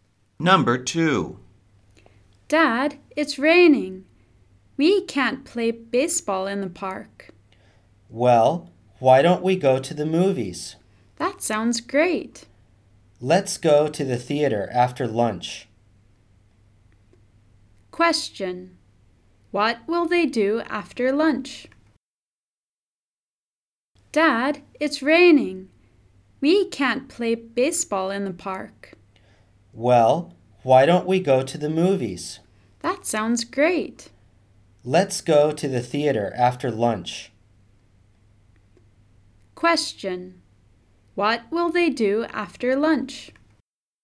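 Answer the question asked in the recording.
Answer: Go to the movies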